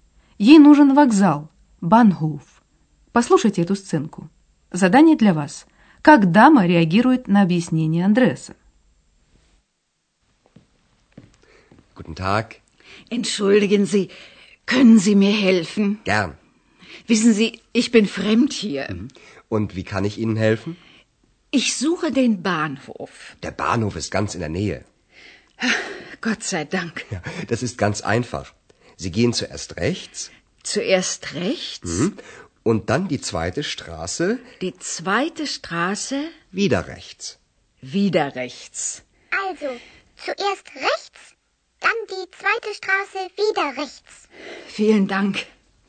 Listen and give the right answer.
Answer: Пожилая дама обрадовалась, что вокзал найти нетрудно.